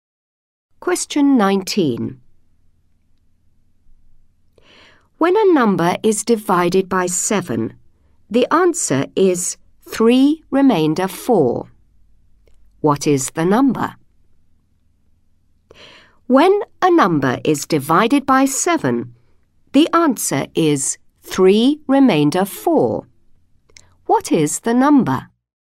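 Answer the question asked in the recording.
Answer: 25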